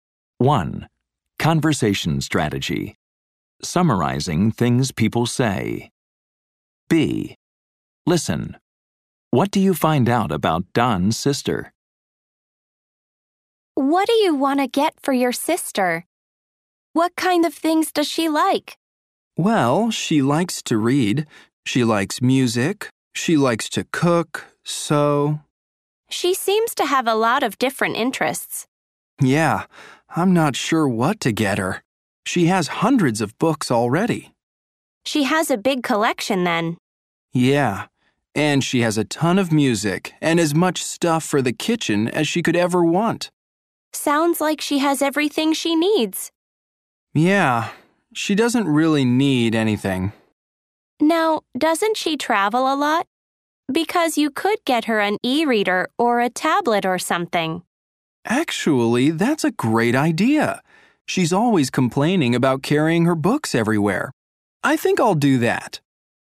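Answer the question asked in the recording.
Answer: She likes to read, listen to music, cook and sew; she has hundreds of books and everything she needs, and she complains about carrying her books when she travels.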